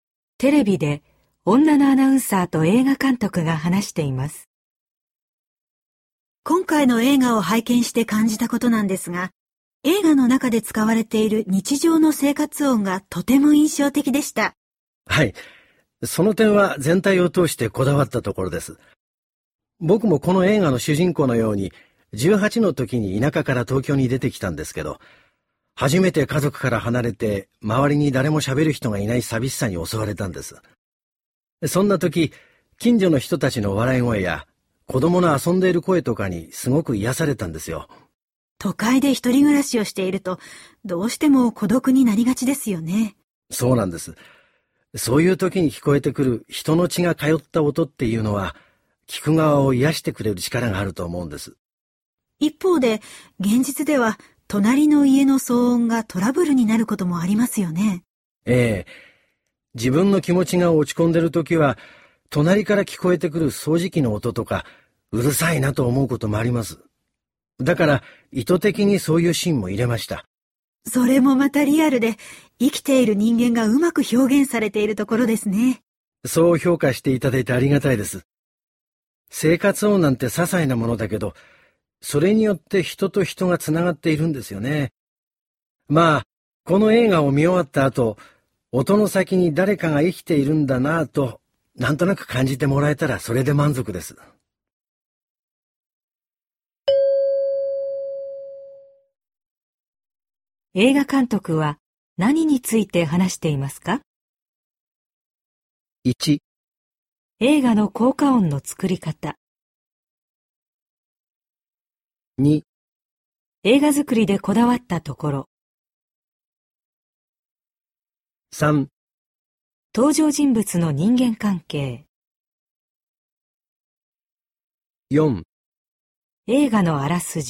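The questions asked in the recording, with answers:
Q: 映画監督は何について話していますか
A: 2: 映画作りでこだわったところ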